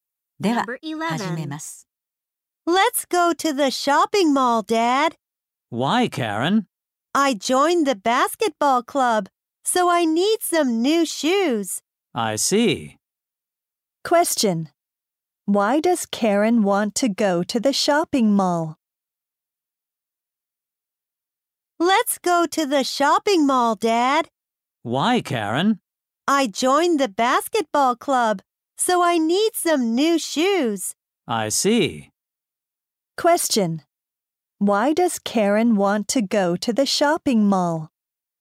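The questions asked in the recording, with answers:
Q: Question. Why does Karen want to go to the shopping mall?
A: She needs new shoes.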